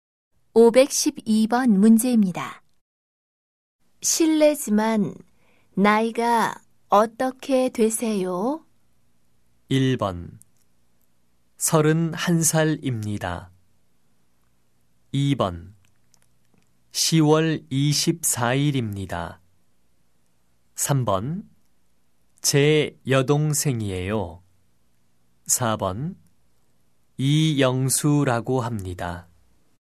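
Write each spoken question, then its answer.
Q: 실례지만 나이가 어떻게 되세요?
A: 1: 31살입니다.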